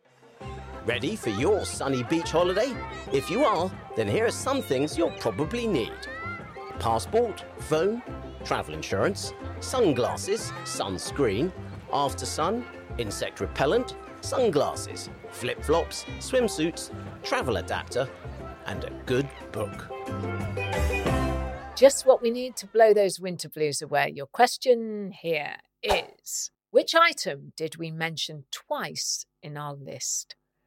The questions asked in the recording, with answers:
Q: Your question here is, which item did we mention twice in our list?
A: And the answer was sunglasses.